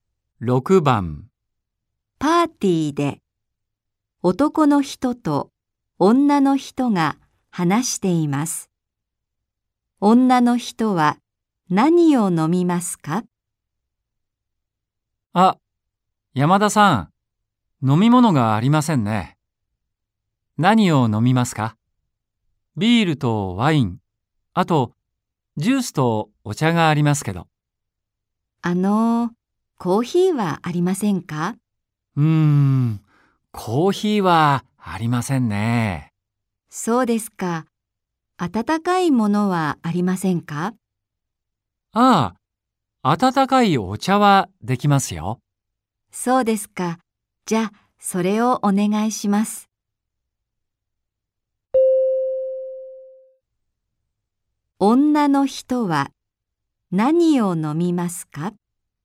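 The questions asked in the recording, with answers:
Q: 女の人は何を飲みますか?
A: 温かいお茶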